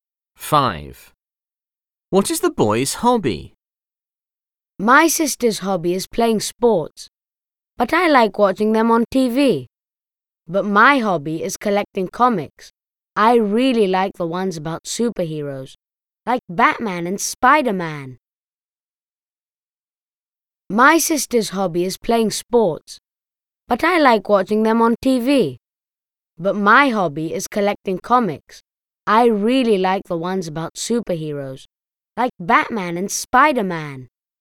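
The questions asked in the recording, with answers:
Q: What is the boy's hobby?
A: collecting comics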